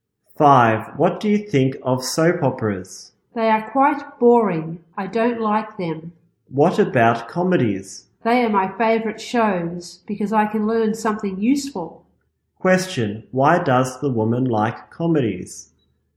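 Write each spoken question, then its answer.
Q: Question. Why does the woman like comedies?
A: Because she can learn something useful.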